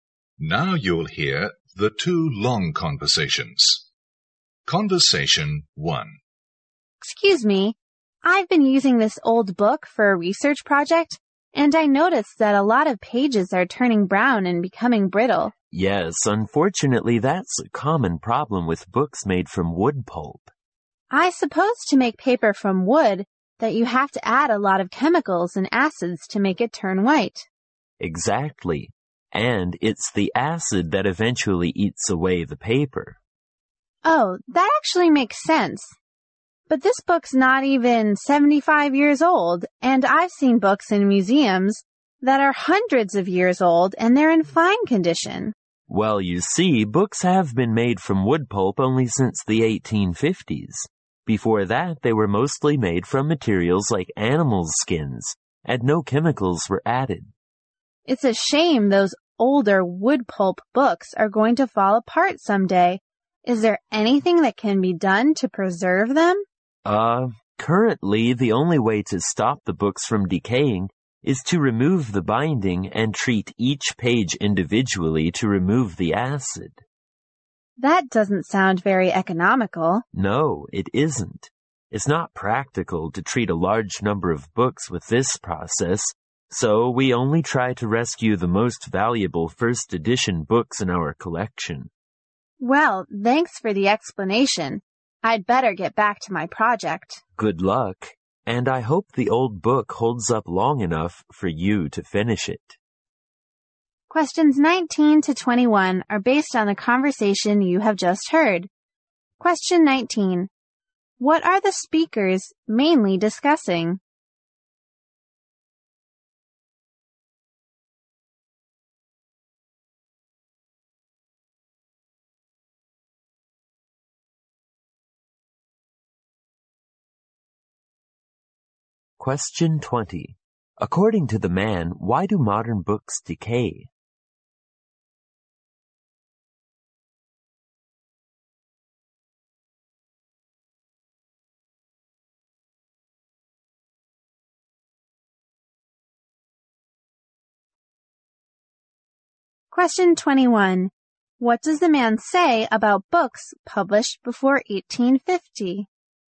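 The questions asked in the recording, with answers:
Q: What are the speakers mainly discussing?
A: Why old wood-pulp books decay and how to preserve them

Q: According to the man, why do modern books decay?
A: The acid used in making wood-pulp paper eats away the paper

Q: What does the man say about books published before 1850?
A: They were made from materials like animal skins with no chemicals added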